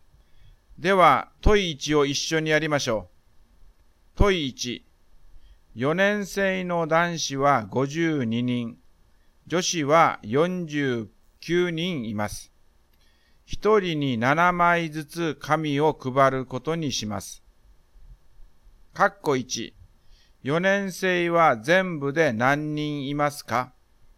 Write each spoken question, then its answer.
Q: 4年生は全部で何人いますか?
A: 4年生は101人います。